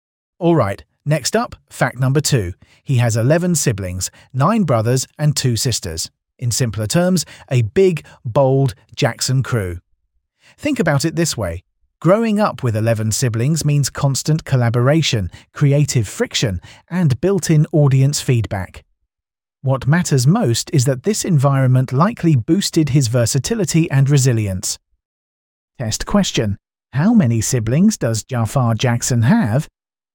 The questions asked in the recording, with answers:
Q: How many siblings does Jaafar Jackson have?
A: Correct answer, 11.